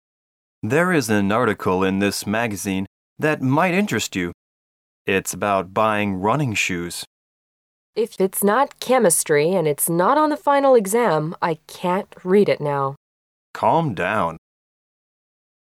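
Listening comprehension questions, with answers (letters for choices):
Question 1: What is the woman probably doing now?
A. She is writing an essay.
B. She is studying for a test.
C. She is shopping for shoes.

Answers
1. B

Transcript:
M: There is an article in this magazine that might interest you. It's about buying running shoes.
W: If it's not chemistry and it's not on the final exam. I can't read it now.
M: Calm down.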